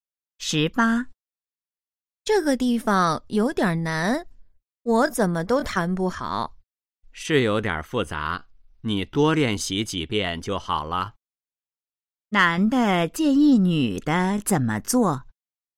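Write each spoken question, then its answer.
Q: 男的建议女的怎么做?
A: 多练习几遍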